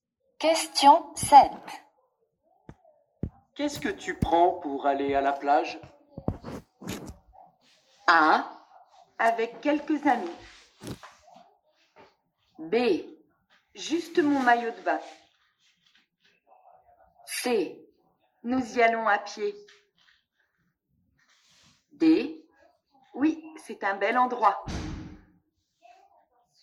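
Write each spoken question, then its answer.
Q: Qu'est-ce que tu prends pour aller à la plage?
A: B: Juste mon maillot de bain.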